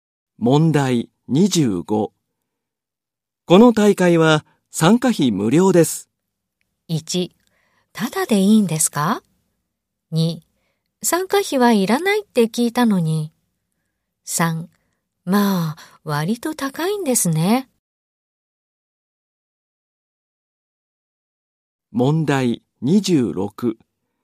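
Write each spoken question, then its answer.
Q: この大会は参加費無料です。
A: 3: ただでいいんですか?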